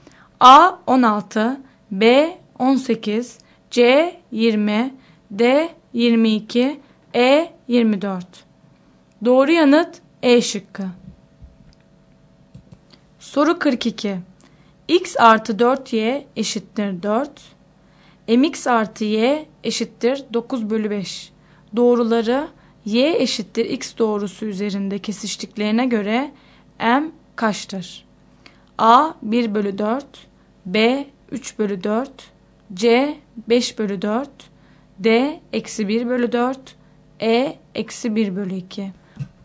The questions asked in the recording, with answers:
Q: Doğruları Y eşittir X doğrusu üzerinde kesiştiklerine göre M kaçtır?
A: Doğru yanıt C şıkkı.